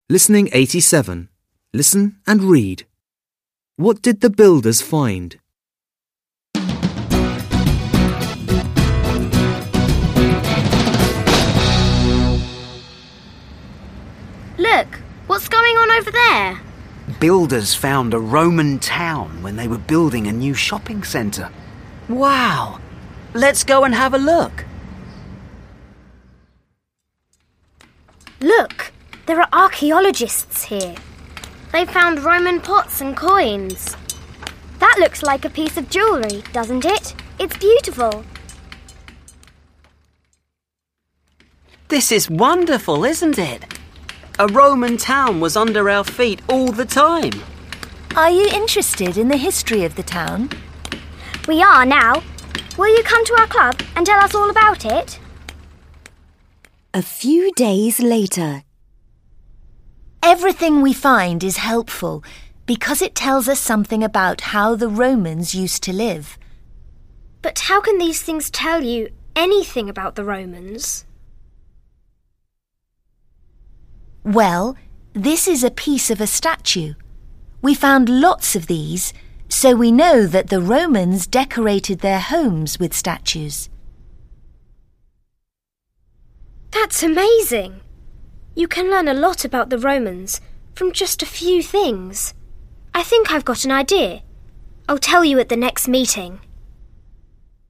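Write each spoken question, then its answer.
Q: What did the builders find?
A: A Roman town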